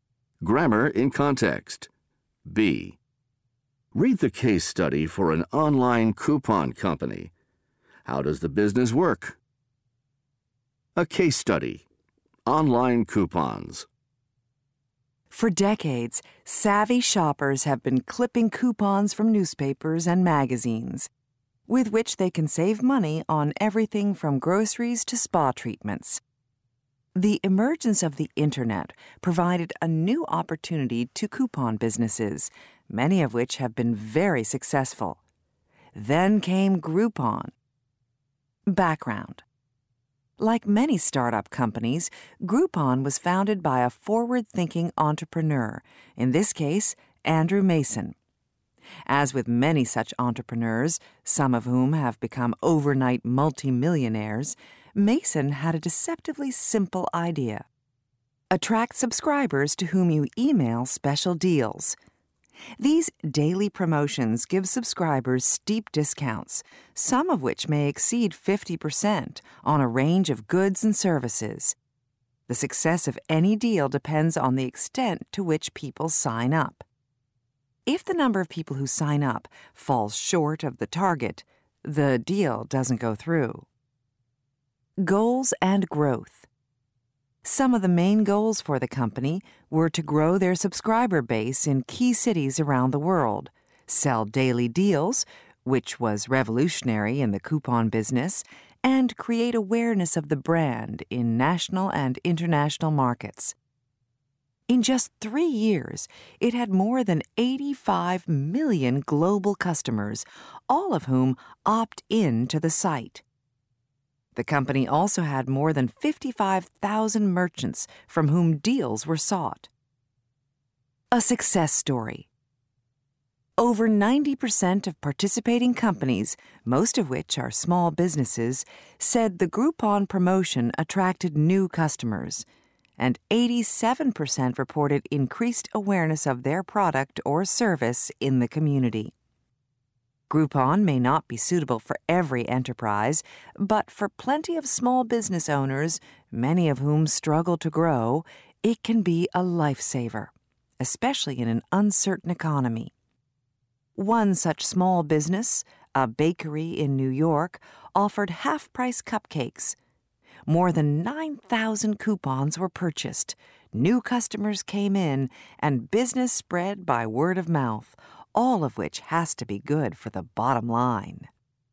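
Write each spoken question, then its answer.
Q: How does the business work?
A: It emails subscribers daily deals with steep discounts; a deal goes through only if enough people sign up.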